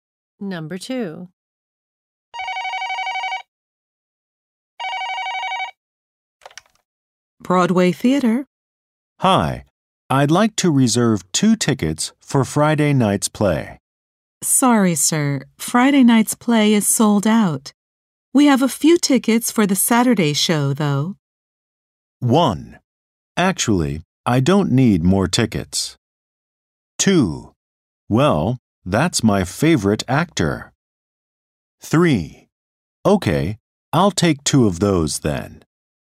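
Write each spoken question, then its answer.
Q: We have a few tickets for the Saturday show, though.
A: 3: Okay, I'll take 2 of those then.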